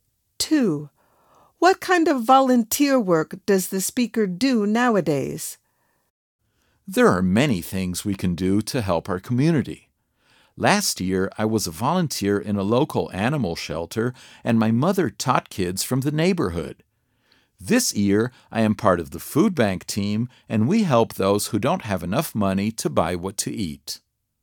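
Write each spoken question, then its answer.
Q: What kind of volunteer work does the speaker do nowadays?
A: Working with the food bank team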